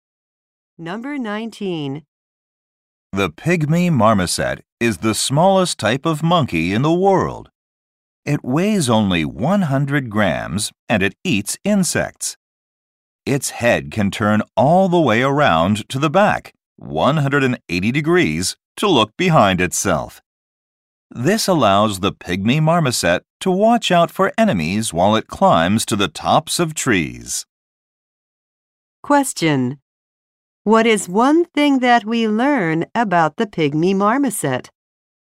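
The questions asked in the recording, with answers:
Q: What is one thing that we learn about the pygmy marmoset?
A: It can turn its head 180 degrees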